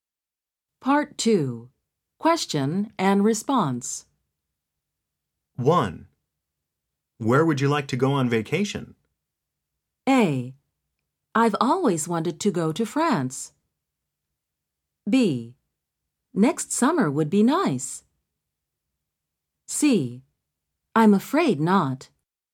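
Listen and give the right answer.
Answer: A: I've always wanted to go to France.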